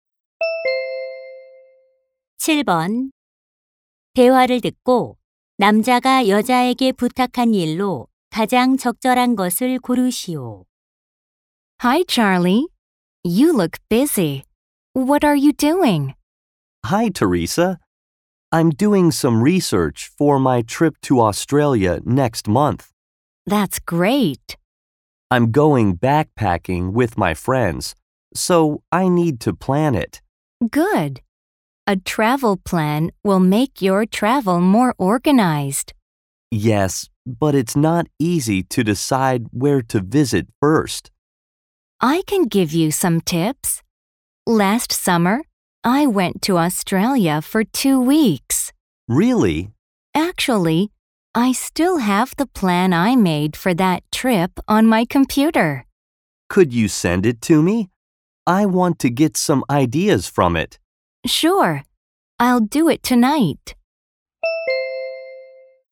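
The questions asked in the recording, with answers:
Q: 대화를 듣고 남자가 여자에게 부탁한 일로 가장 적절한 것을 고르시오.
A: 여행 계획서 보내 주기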